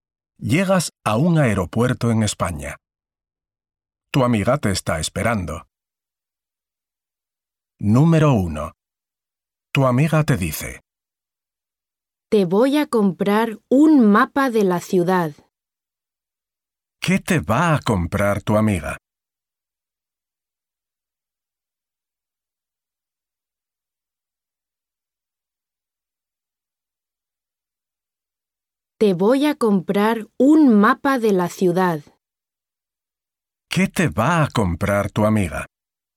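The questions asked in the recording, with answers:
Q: ¿Qué te va a comprar tu amiga?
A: un mapa de la ciudad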